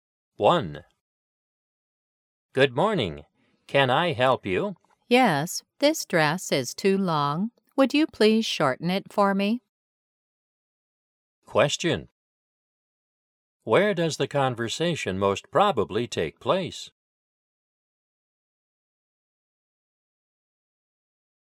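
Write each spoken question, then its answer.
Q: Where does the conversation most probably take place?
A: In a tailor's or clothing shop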